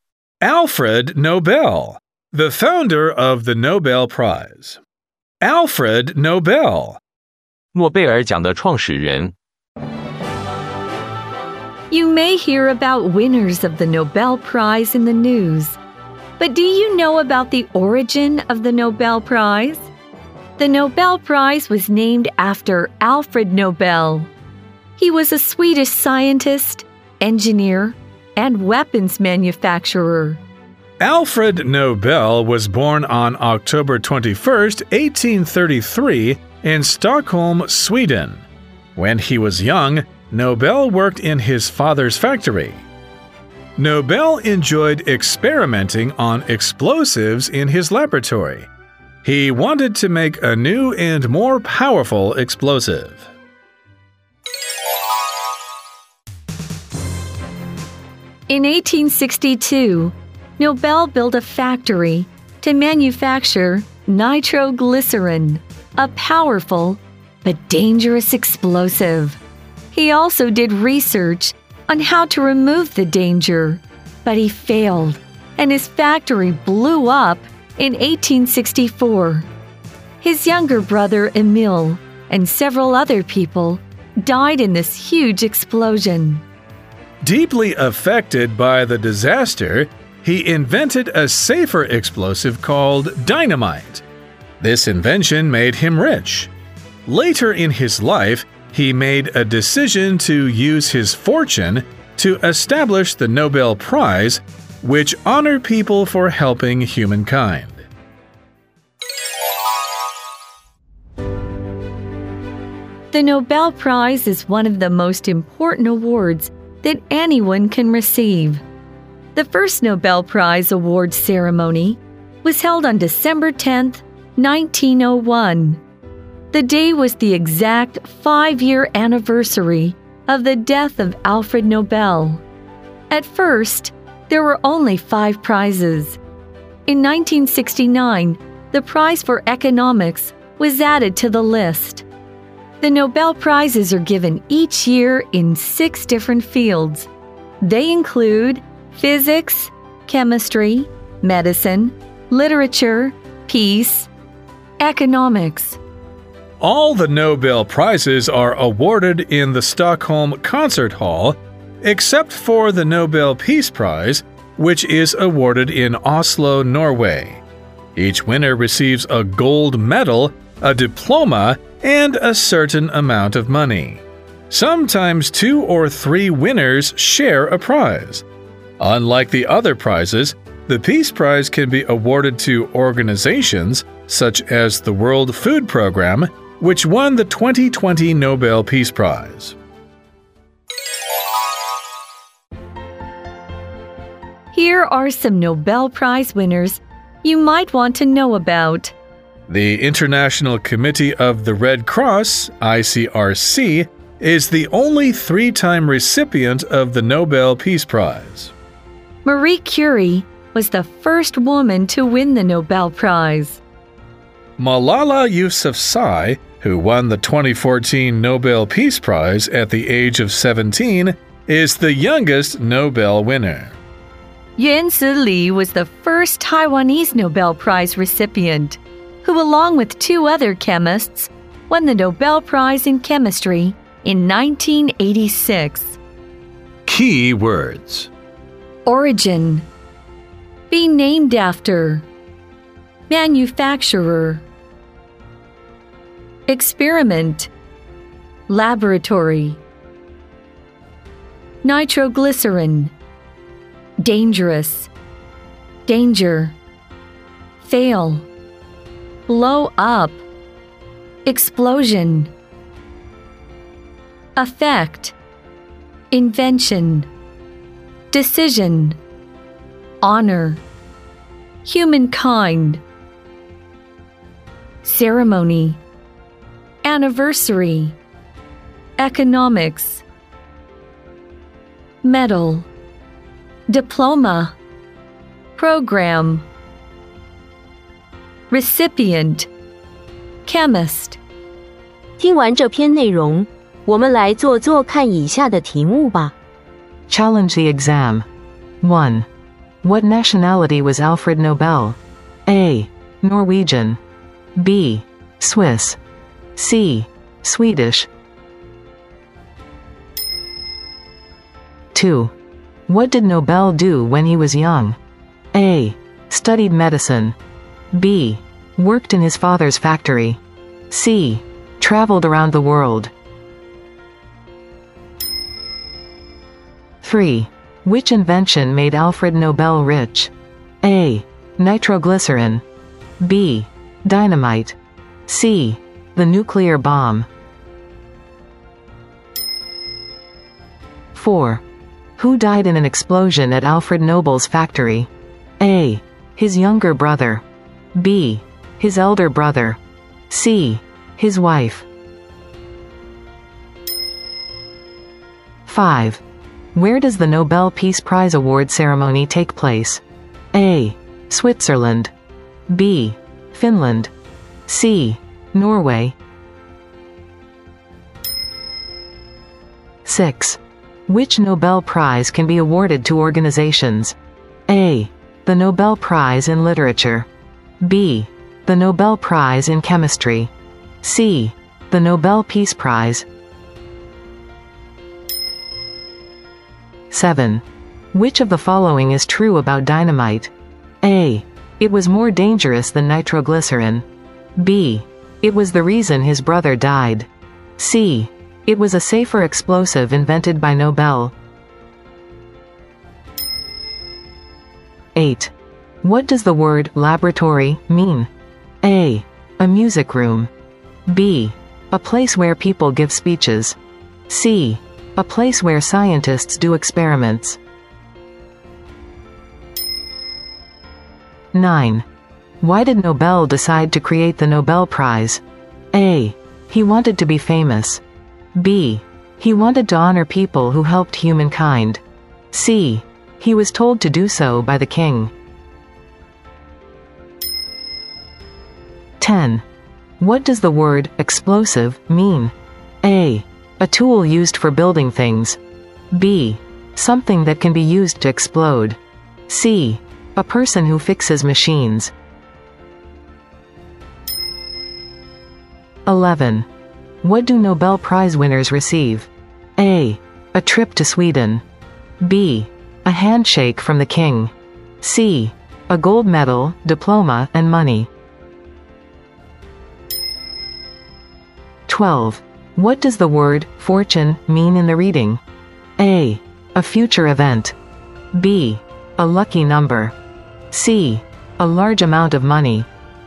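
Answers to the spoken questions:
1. C: Swedish
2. B: Worked in his father's factory
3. B: Dynamite
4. A: His younger brother
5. C: Norway
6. C: The Nobel Peace Prize
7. C: It was a safer explosive invented by Nobel
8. C: A place where scientists do experiments
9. B: He wanted to honor people who helped humankind
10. B: Something that can be used to explode
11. C: A gold medal, diploma, and money
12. C: A large amount of money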